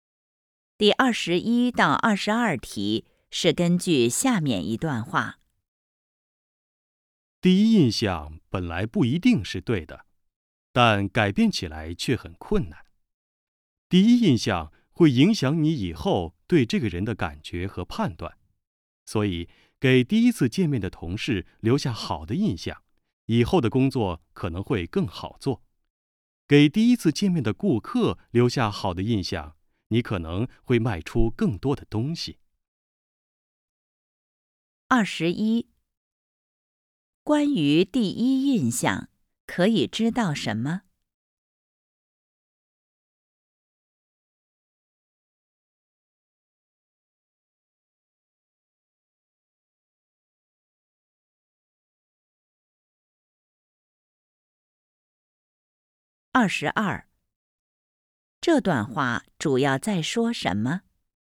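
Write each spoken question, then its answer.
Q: 关于第一印象可以知道什么?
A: 不一定是对的,但很难改变

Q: 这段话主要在说什么?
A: 第一印象很重要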